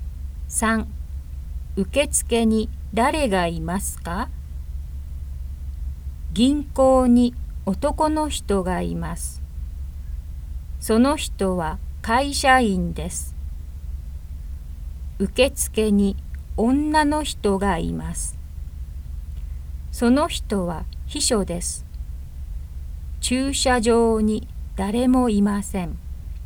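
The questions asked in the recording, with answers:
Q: 受付に誰がいますか?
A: 女の人(秘書)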